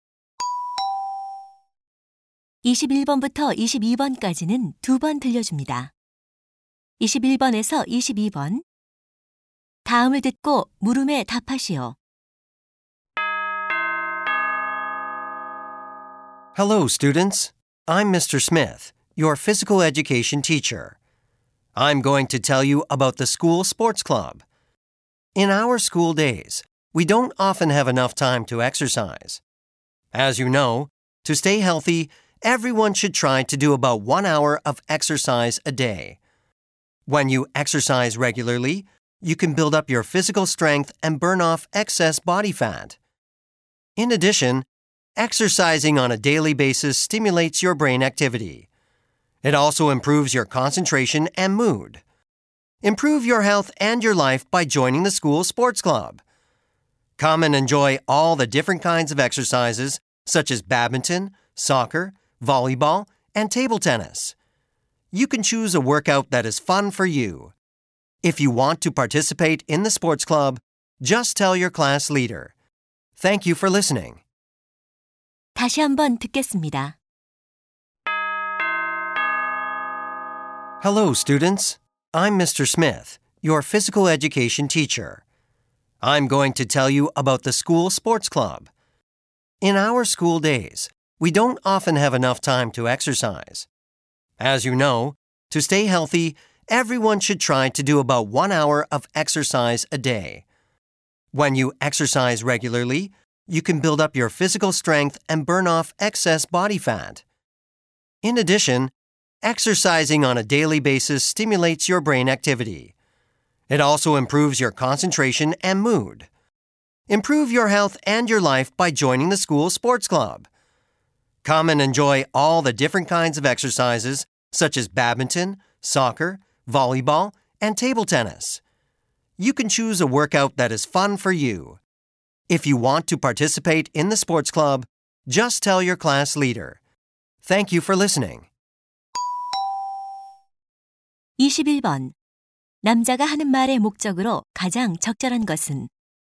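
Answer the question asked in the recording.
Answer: 학교 스포츠 클럽 가입을 권장하려고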